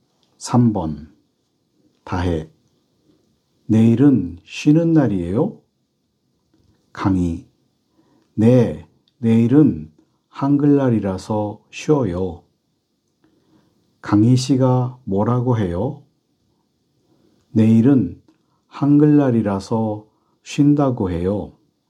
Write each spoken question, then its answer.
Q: 강희 씨가 뭐라고 해요?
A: 내일은 한글날이라서 쉰다고 해요. 쉰대요.